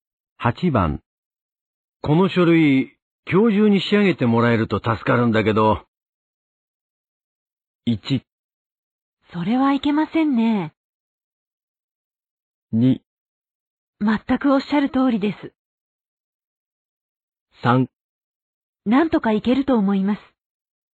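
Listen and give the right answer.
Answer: 3: なんとかいけると思います。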